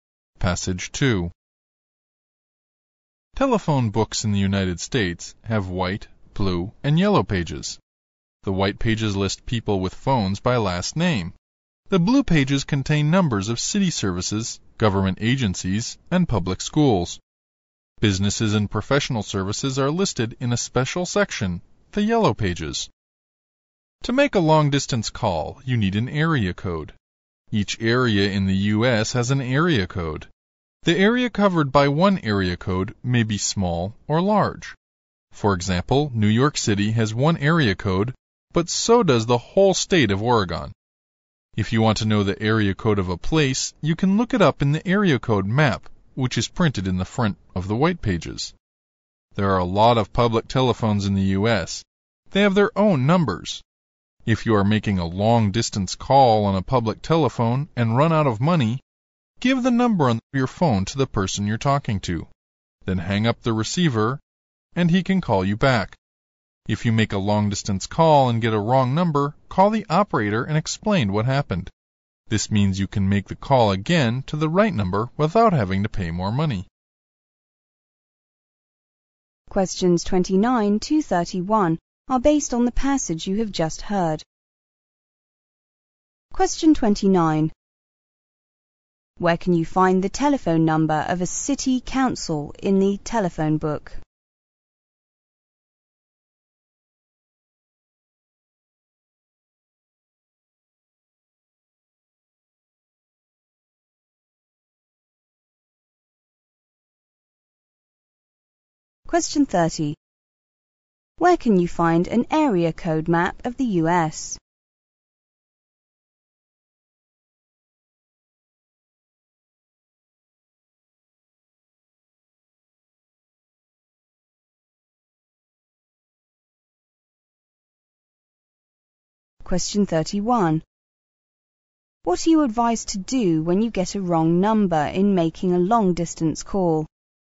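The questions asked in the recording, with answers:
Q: Where can you find the telephone number of a city council in the telephone book?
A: In the blue pages

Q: Where can you find an area code map of the US?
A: In the front of the white pages

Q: What are you advised to do when you get a wrong number in making a long-distance call?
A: Call the operator and explain what happened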